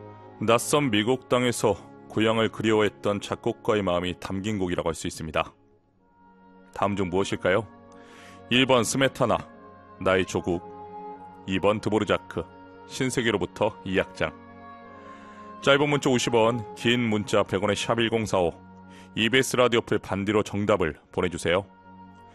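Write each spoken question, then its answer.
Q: 다음 중 무엇일까요? 1번 스메타나, 나의 조국, 2번 드보르자크, 신세계로부터 이 악장.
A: 2: 드보르자크, 신세계로부터 이 악장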